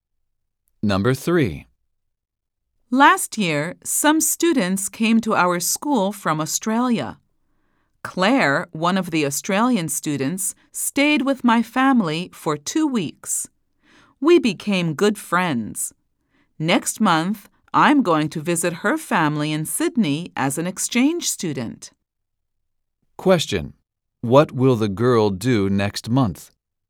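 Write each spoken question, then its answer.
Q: What will the girl do next month?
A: Visit Claire's family in Sydney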